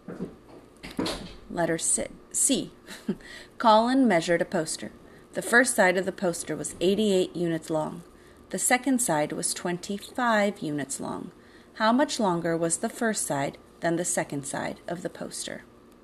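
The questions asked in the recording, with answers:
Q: How much longer was the first side than the second side of the poster?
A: 63 units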